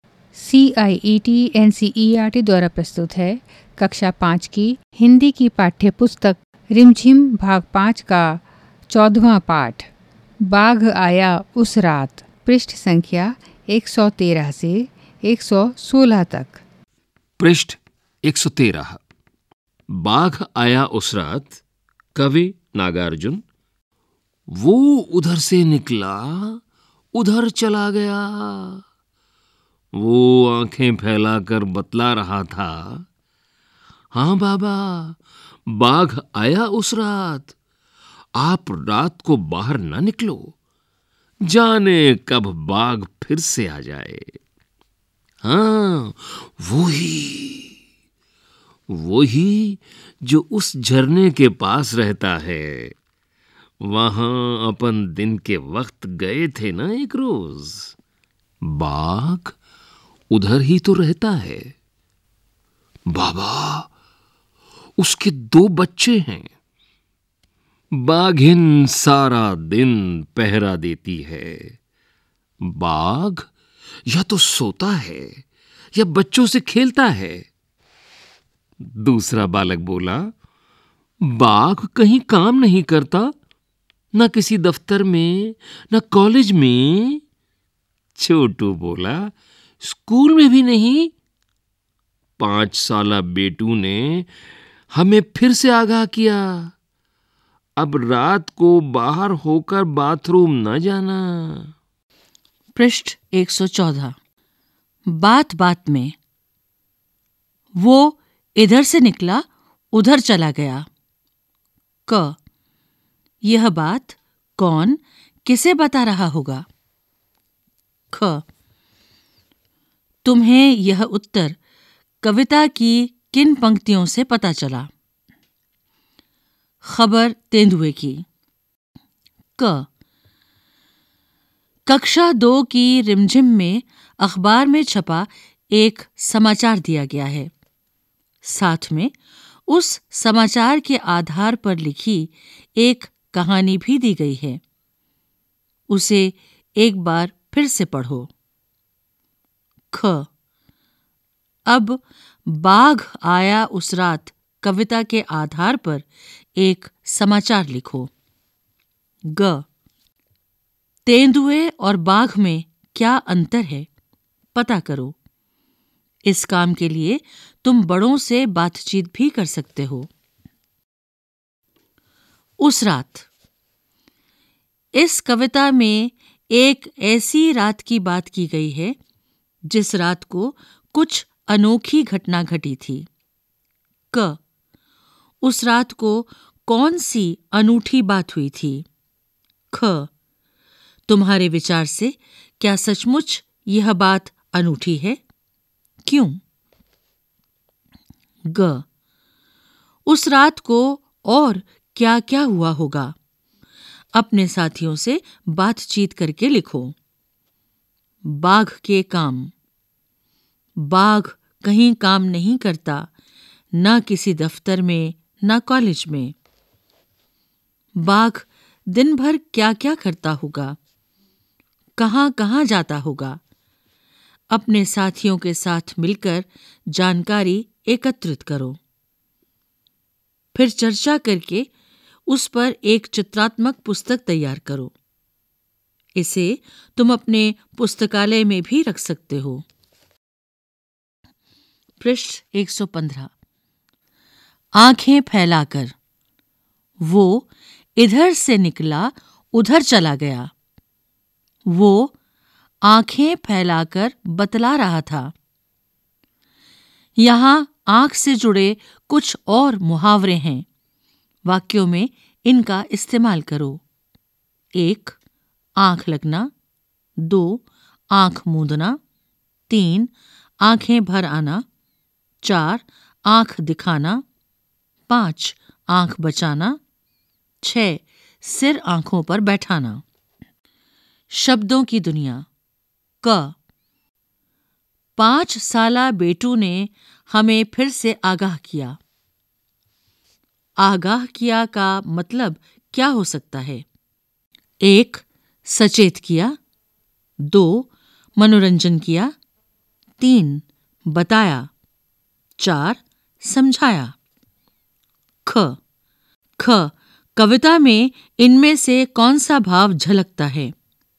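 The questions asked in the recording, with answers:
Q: 5 साला बेटू ने हमें फिर से आगाह किया। आगाह किया का मतलब क्या हो सकता है।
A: 1: सचेत किया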